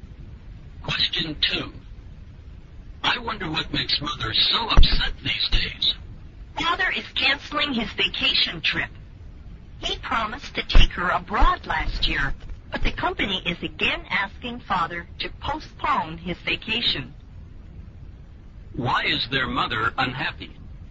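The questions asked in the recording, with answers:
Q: Why is their mother unhappy?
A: Father is canceling their vacation trip abroad again.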